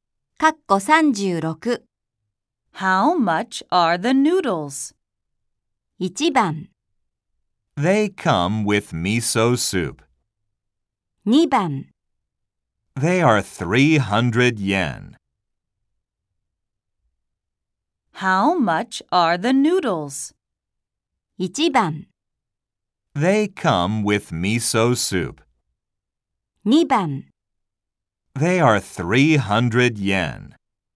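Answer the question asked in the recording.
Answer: 2: They are 300 yen.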